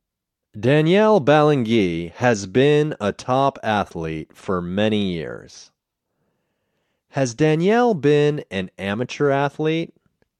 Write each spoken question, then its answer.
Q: Has Danielle been an amateur athlete?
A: No, she hasn't been an amateur athlete.